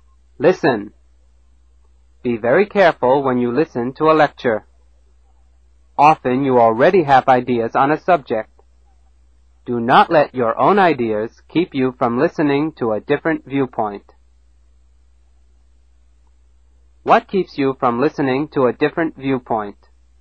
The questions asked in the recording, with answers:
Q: What keeps you from listening to a different viewpoint?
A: Your own ideas.